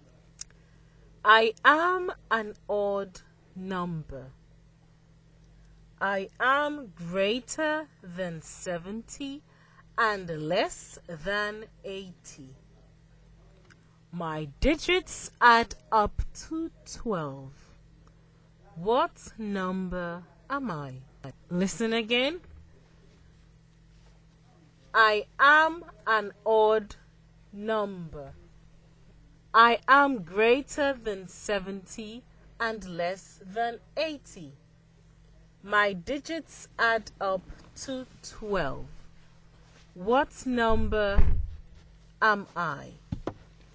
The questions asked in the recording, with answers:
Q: What number am I?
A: I am the number 75.